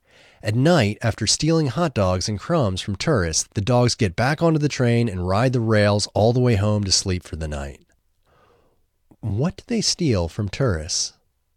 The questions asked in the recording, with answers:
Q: What do they steal from tourists?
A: They steal hot dogs and crumbs from tourists.